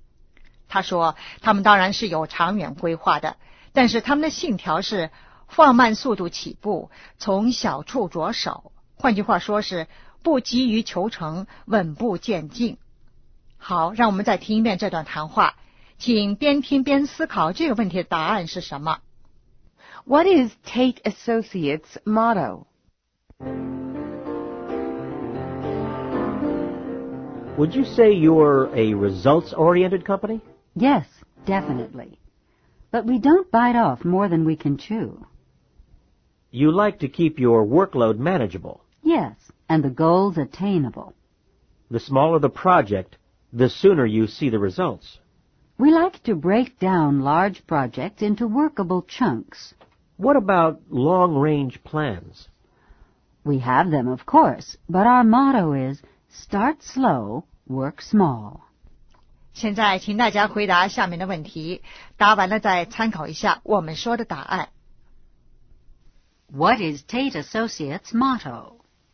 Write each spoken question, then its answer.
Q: What is Tate Associates' motto?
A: Start slow, work small.